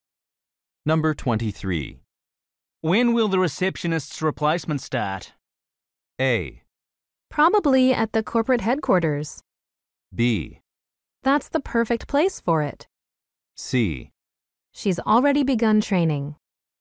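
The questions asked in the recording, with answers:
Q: When will the receptionist's replacement start?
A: C: She's already begun training.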